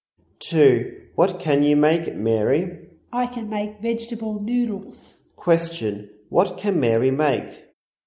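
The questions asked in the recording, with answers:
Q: What can Mary make?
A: Vegetable noodles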